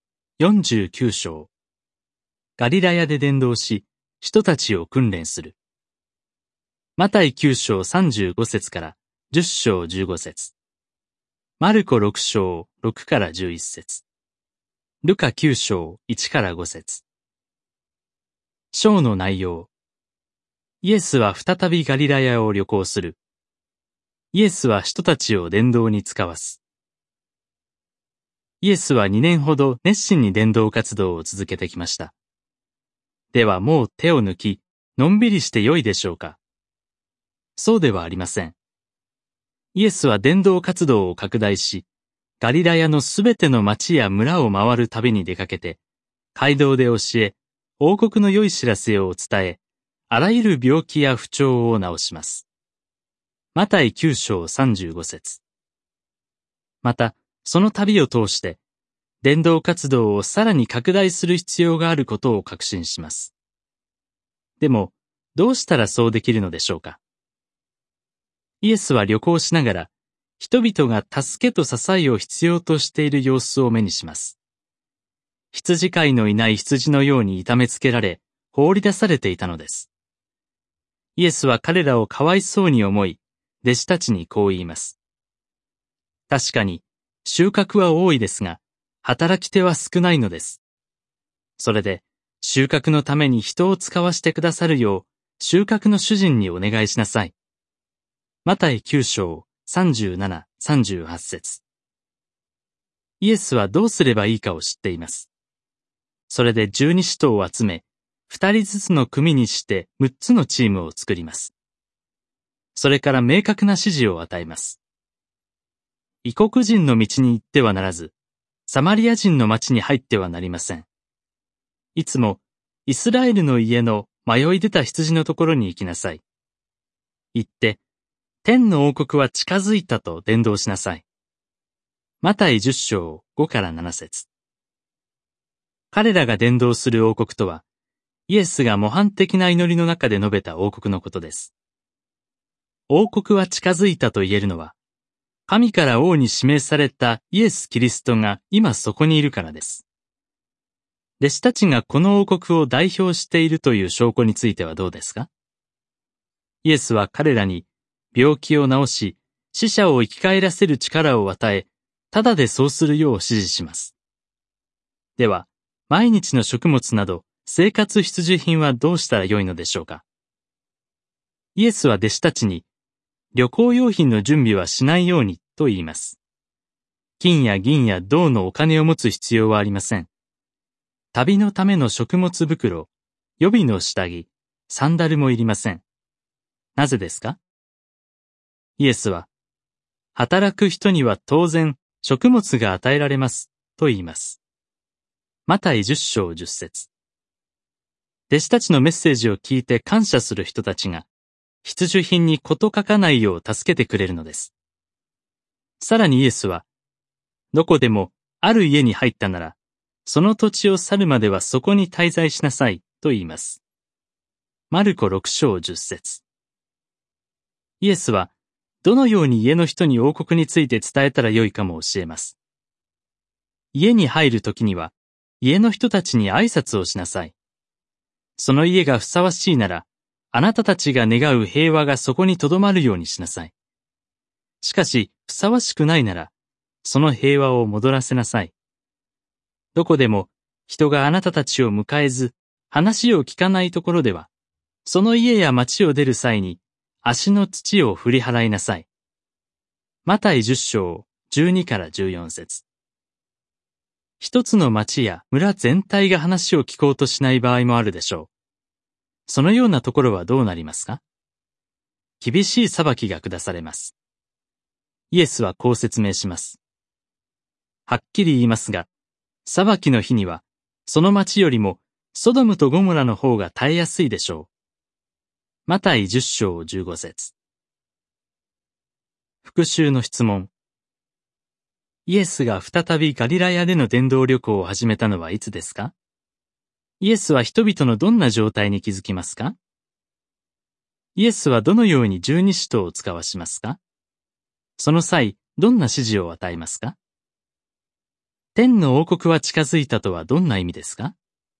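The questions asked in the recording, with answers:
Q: イエスが再びガリラヤでの伝道旅行を始めたのはいつですか?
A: 約2年間熱心に伝道活動を続けた後

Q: イエスは人々のどんな状態に気づきますか?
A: 羊飼いのいない羊のように痛めつけられ、放り出されていて、助けと支えを必要としている

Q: イエスはどのように十二使徒を使わしますか?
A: 二人ずつの組にして六つのチームで使わす

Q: その際、どんな指示を与えますか?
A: 異国人やサマリア人の所ではなくイスラエルの迷い出た羊の所に行き、天の王国は近づいたと伝道し、ただで病気を治し、旅行用品を準備せず、ふさわしい家に滞在し、聞かない所では足の土を振り払う

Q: 天の王国は近づいたとはどんな意味ですか?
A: 神から王に指名されたイエス・キリストがそこにいるということ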